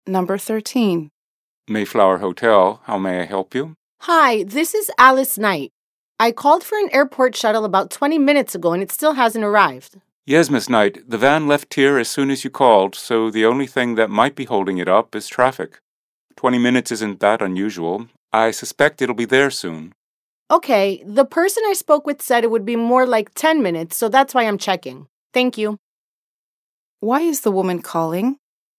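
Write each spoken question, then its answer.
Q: Why is the woman calling?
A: To ask why the airport shuttle she ordered hasn't arrived yet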